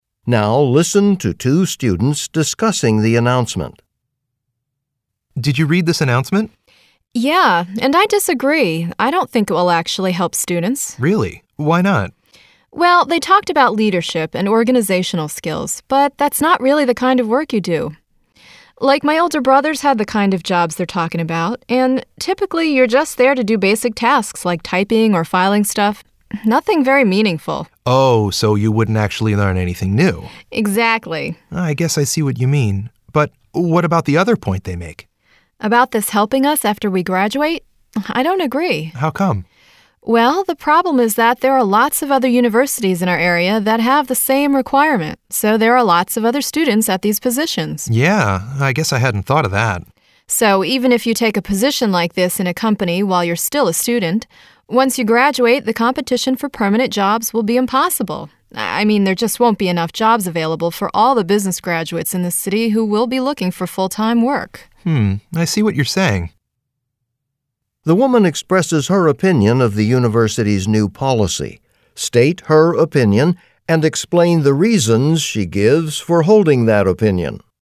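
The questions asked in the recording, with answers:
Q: The woman expresses her opinion of the university's new policy. State her opinion and explain the reasons she gives for holding that opinion.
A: She disagrees with it. First, students only do basic tasks like typing or filing, so they won't learn leadership or organizational skills. Second, many nearby universities have the same requirement, so after graduation there will be too much competition and not enough full-time jobs.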